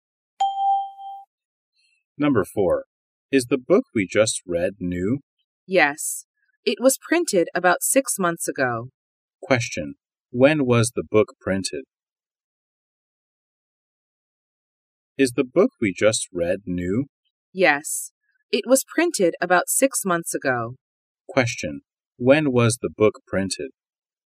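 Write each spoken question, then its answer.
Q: When was the book printed?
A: About 6 months ago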